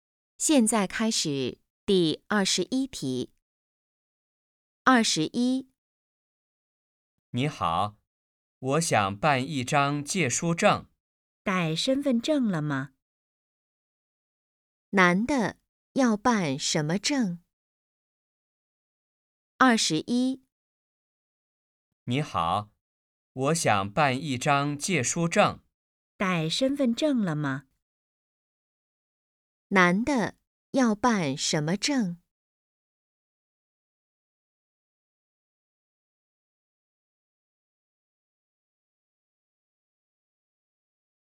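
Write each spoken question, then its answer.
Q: 男的要办什么证?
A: 借书证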